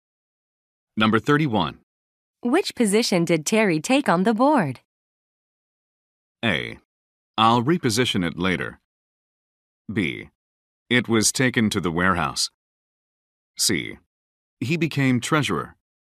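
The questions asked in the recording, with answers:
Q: Which position did Terry take on the board?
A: C: He became treasurer.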